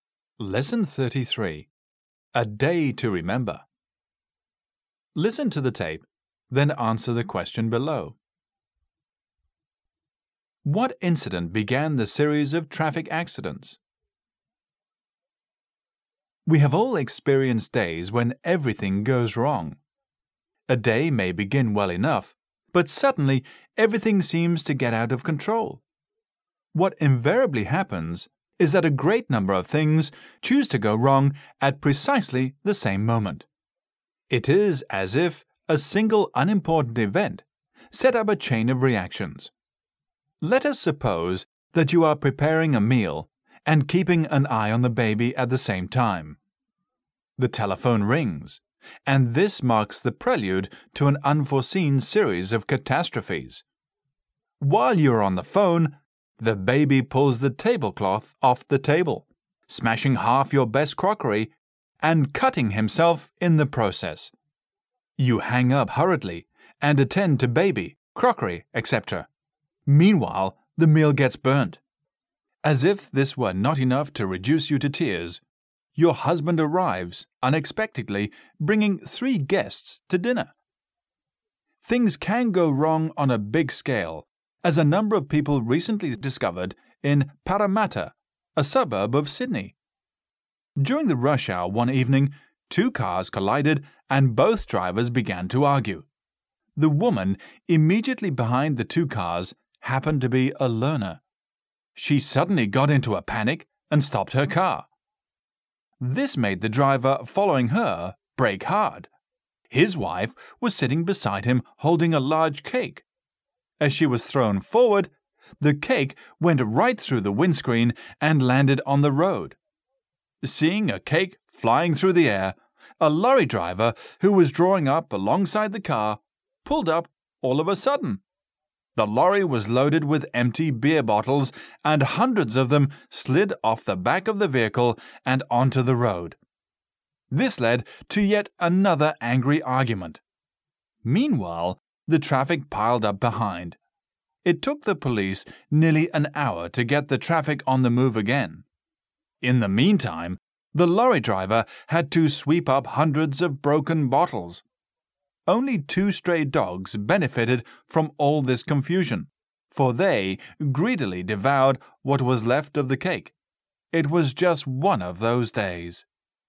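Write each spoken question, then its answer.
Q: What incident began the series of traffic accidents?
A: Two cars collided during the rush hour and both drivers began to argue.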